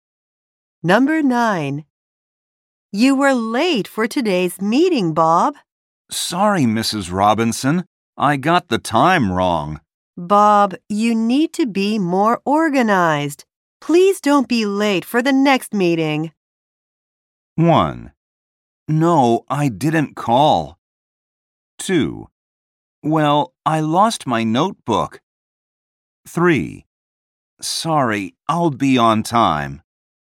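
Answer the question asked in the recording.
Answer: 3: Sorry, I'll be on time.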